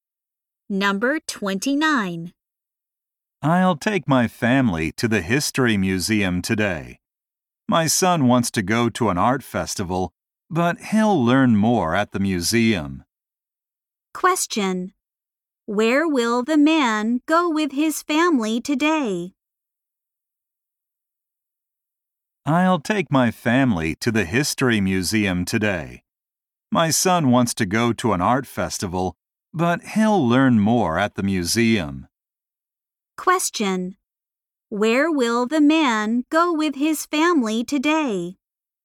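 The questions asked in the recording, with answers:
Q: Where will the man go with his family today?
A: To the History Museum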